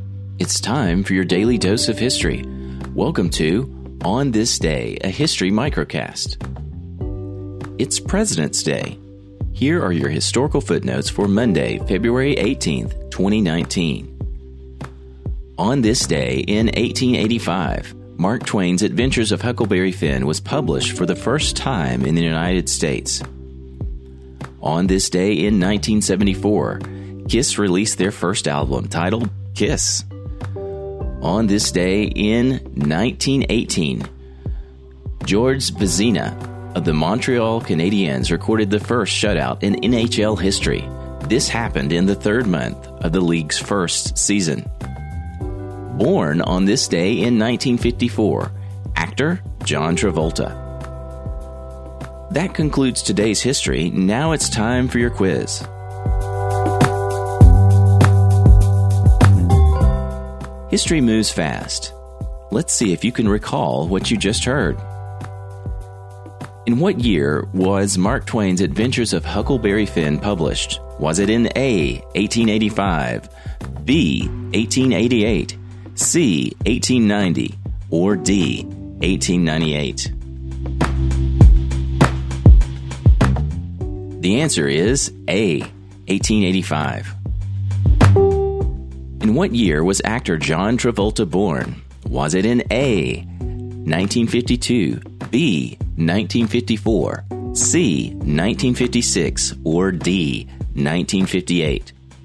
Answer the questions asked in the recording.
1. The answer is A, 1885.
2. The answer is B, 1954.